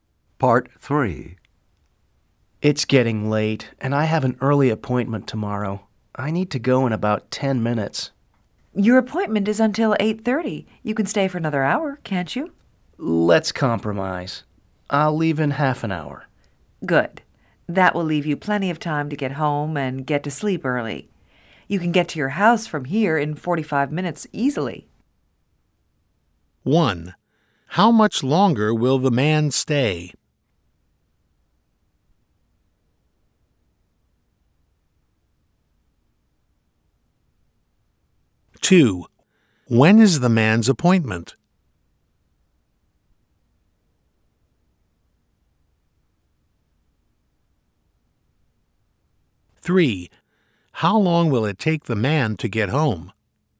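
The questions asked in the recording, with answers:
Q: How much longer will the man stay?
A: Half an hour

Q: When is the man's appointment?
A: At 8:30 tomorrow

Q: How long will it take the man to get home?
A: 45 minutes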